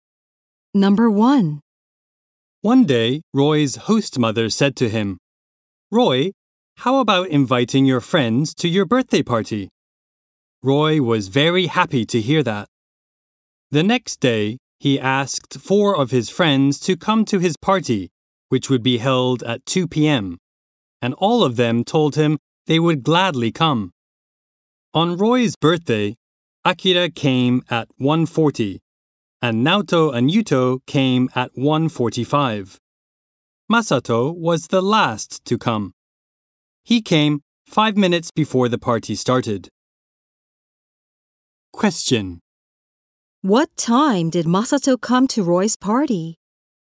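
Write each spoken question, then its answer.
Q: What time did Masato come to Roy's party?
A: At 1:55.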